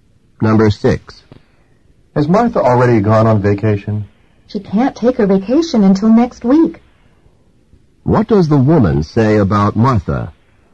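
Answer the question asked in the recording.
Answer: She hasn't gone yet; she'll go on vacation next week.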